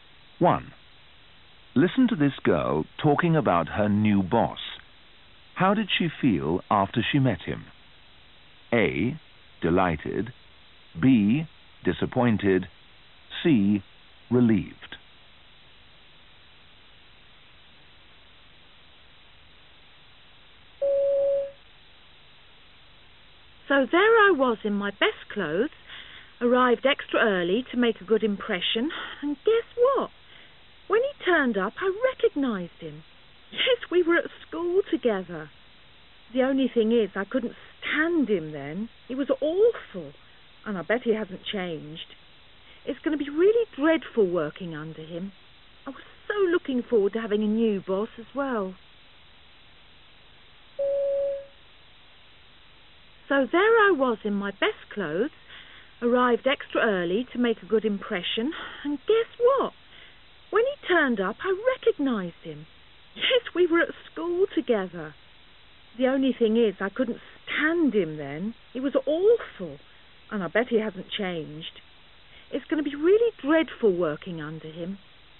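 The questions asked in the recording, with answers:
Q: How did she feel after she met him?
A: B: Disappointed.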